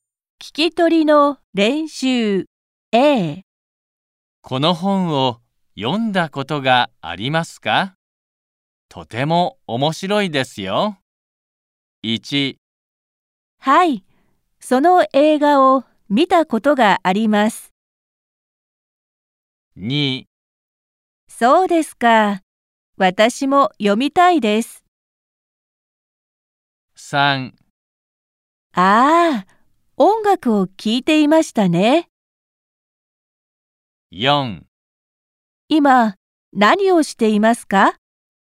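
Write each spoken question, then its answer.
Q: この本を読んだことがありますか?とても面白いですよ。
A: 2: そうですか、私も読みたいです。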